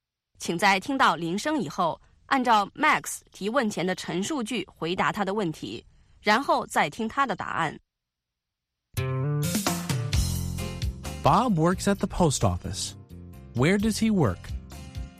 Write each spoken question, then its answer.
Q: Where does he work?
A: He works at the post office.